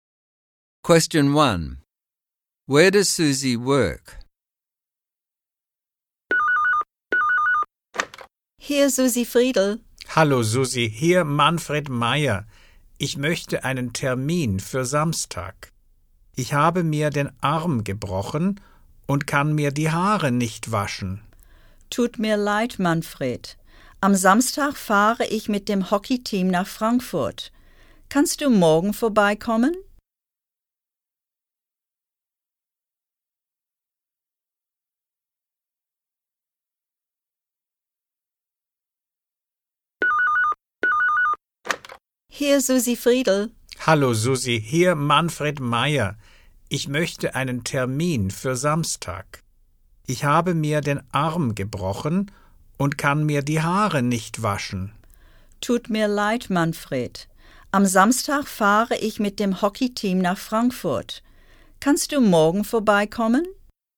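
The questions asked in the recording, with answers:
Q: Where does Susie work?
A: At a hairdresser's (she is a hairdresser)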